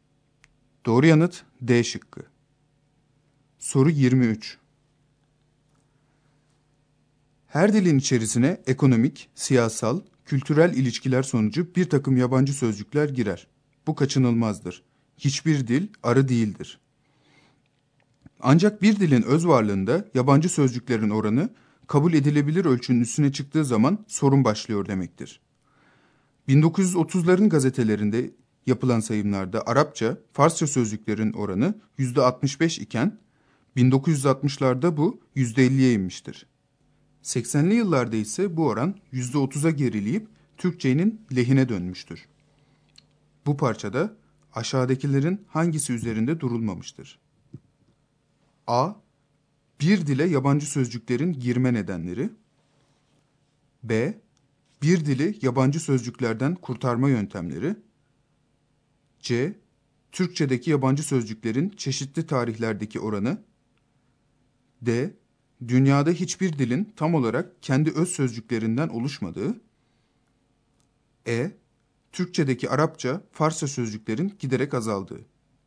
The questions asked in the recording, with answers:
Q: Bu parçada aşağıdakilerin hangisi üzerinde durulmamıştır?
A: Doğru yanıt B şıkkı.